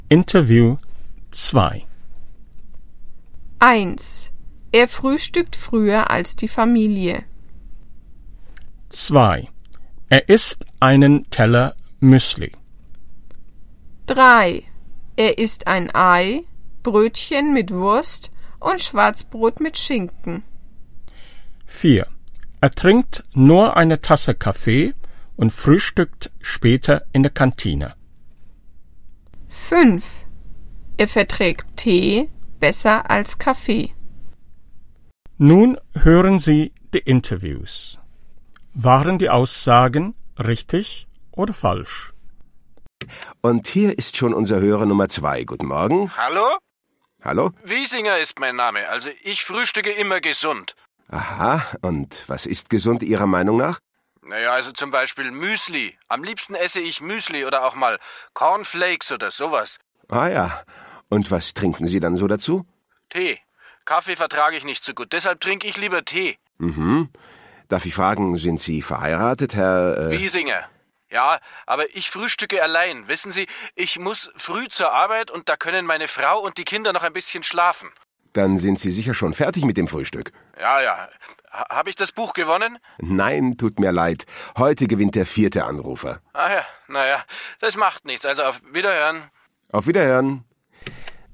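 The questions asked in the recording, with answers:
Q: Er frühstückt früher als die Familie.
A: richtig

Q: Er isst einen Teller Müsli.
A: richtig

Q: Er isst ein Ei, Brötchen mit Wurst und Schwarzbrot mit Schinken.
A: falsch

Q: Er trinkt nur eine Tasse Kaffee und frühstückt später in der Kantine.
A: falsch

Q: Er verträgt Tee besser als Kaffee.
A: richtig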